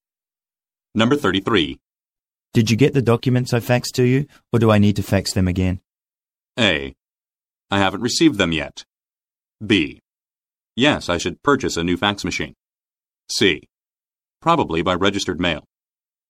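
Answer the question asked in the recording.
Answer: A: I haven't received them yet.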